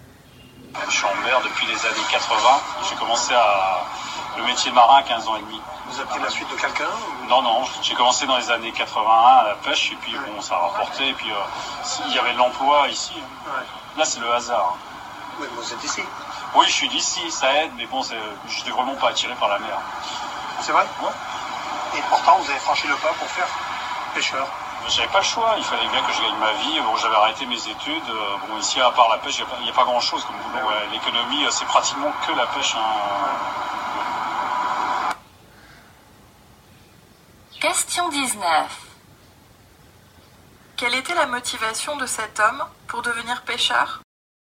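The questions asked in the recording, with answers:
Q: Quelle était la motivation de cet homme pour devenir pêcheur?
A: Gagner sa vie, car il n'y avait presque pas d'autre emploi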